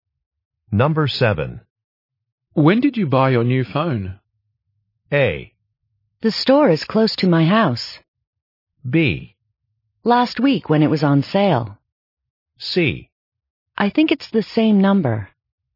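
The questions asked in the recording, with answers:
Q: When did you buy your new phone?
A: B: Last week when it was on sale.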